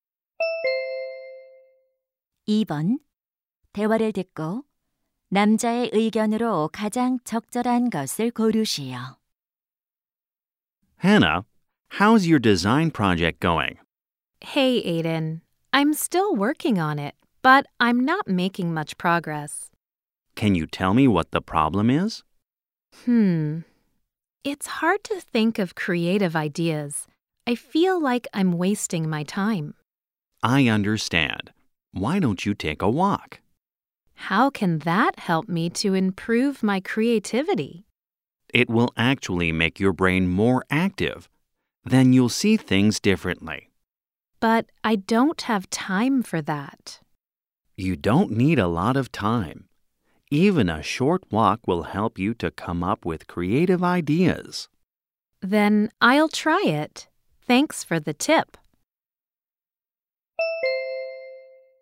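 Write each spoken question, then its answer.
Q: 대화를 듣고 남자의 의견으로 가장 적절한 것을 고르시오.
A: 짧은 산책이 창의적인 아이디어를 떠올리는 데 도움이 된다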